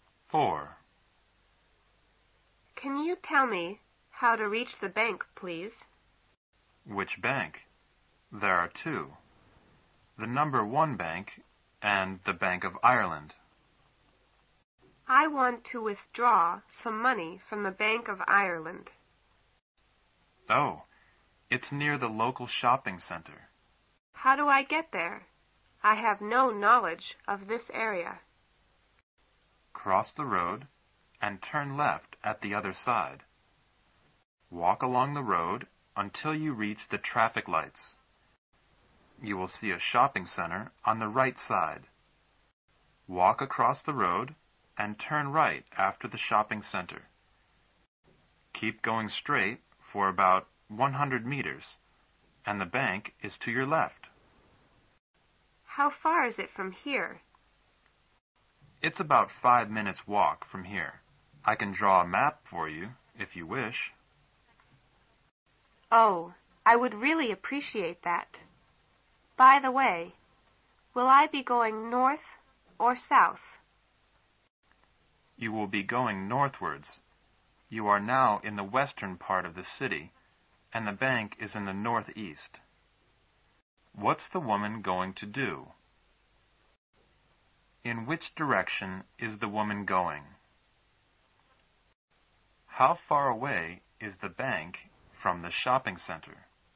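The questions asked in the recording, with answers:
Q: What's the woman going to do?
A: Withdraw some money from the Bank of Ireland

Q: In which direction is the woman going?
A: North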